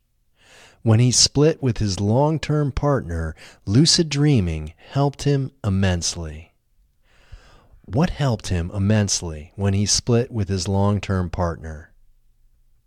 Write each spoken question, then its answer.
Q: What helped him immensely when he split with his long-term partner?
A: Lucid dreaming helped him immensely when he split with his long-term partner.